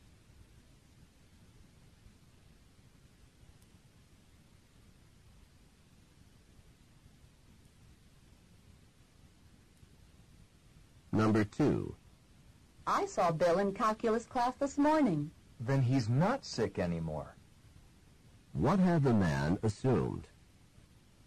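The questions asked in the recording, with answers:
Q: What had the man assumed?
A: That Bill was still sick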